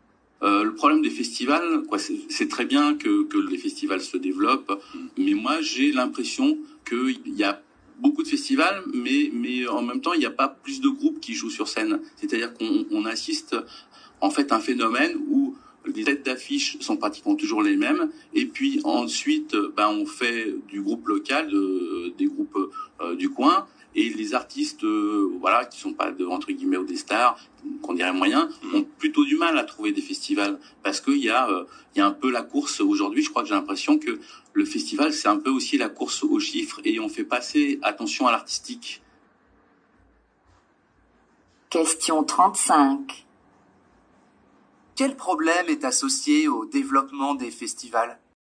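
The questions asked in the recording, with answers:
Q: Quel problème est associé au développement des festivals ?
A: Les têtes d'affiche sont toujours les mêmes et les artistes moyens ont du mal à trouver des festivals.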